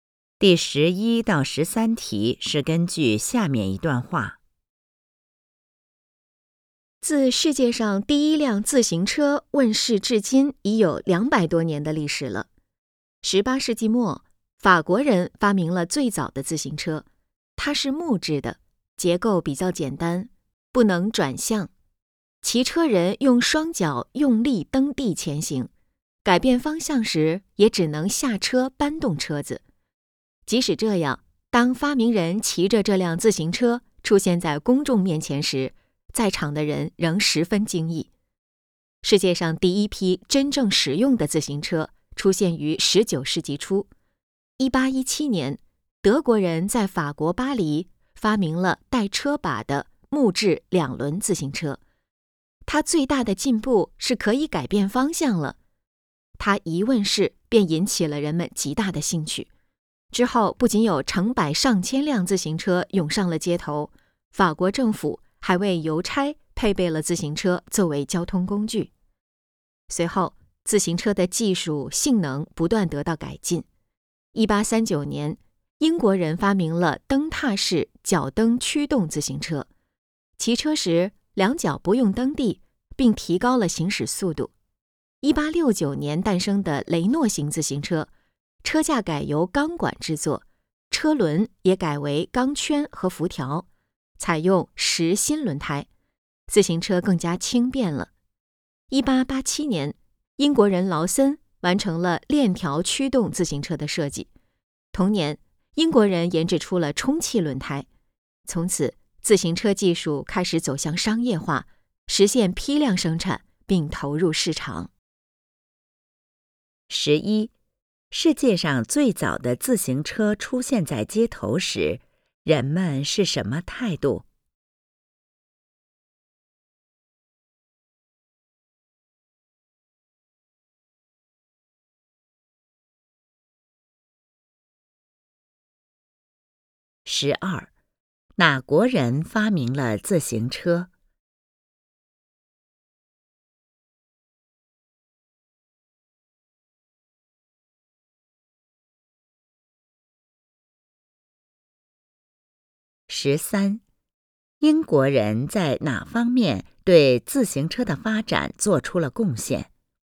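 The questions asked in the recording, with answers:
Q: 世界上最早的自行车出现在街头时,人们是什么态度?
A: 十分惊异

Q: 哪国人发明了自行车?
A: 法国人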